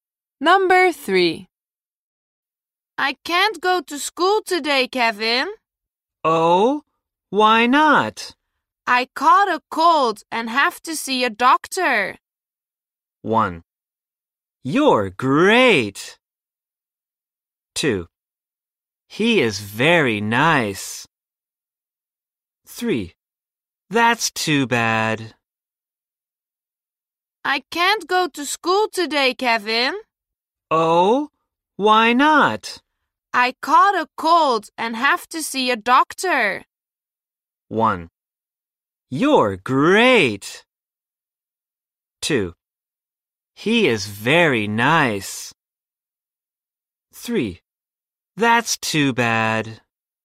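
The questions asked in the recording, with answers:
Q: I caught a cold and have to see a doctor.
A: 3: That's too bad.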